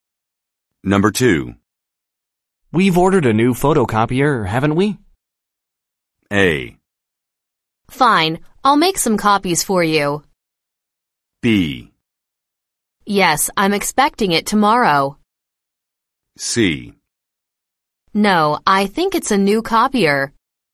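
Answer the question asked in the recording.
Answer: B: Yes, I'm expecting it tomorrow.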